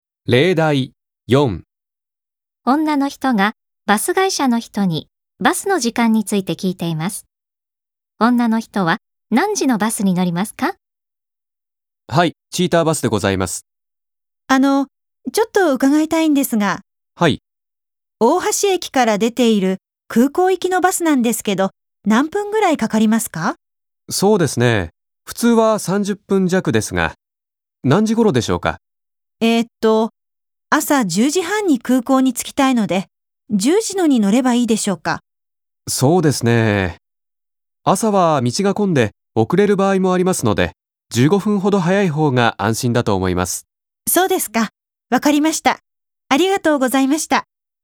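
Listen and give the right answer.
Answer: 9時45分のバス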